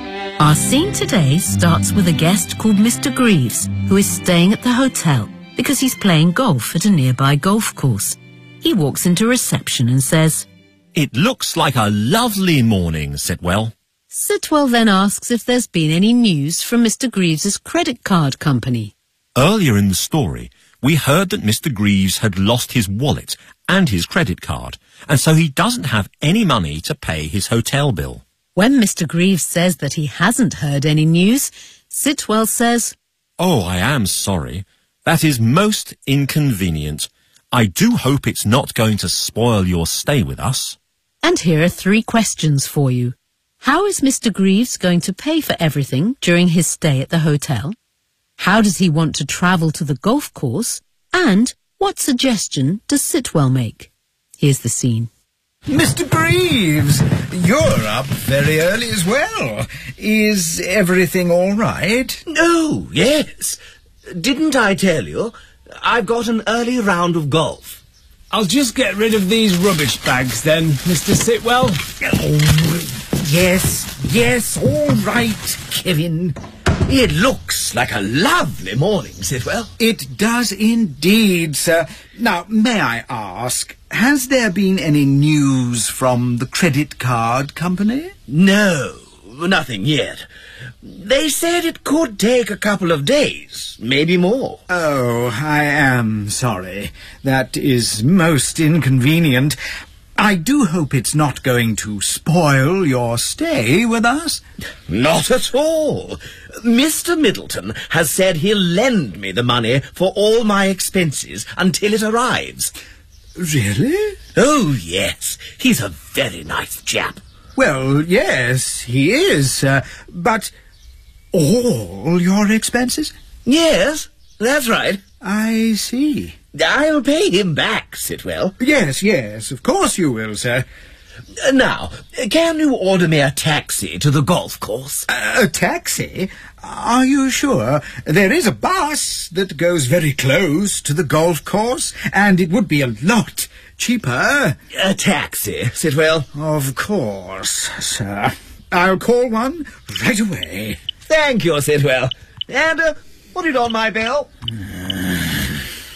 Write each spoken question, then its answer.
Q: How is Mr. Greaves going to pay for everything during his stay at the hotel?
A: "Mr. Middleton has said he'll lend me the money for all my expenses."

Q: How does he want to travel to the golf course?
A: "Can you order me a taxi to the golf course?"

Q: And what suggestion does Sitwell make?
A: "There is a bus that goes very close to the golf course, and it would be a lot cheaper."